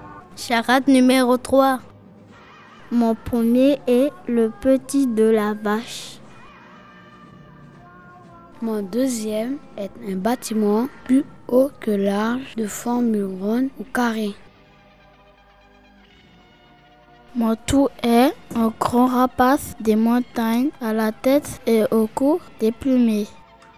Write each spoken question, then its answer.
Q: Mon tout est un grand rapace des montagnes à la tête et au cou déplumé.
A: le vautour.